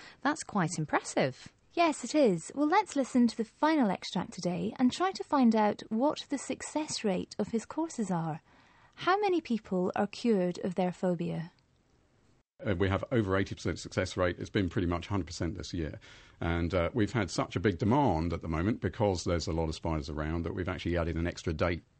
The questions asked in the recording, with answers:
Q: How many people are cured of their phobia?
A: Wow, over 80% success rate.